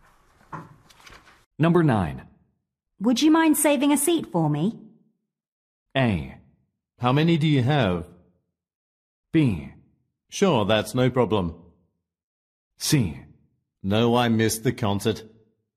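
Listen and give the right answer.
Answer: B: Sure, that's no problem.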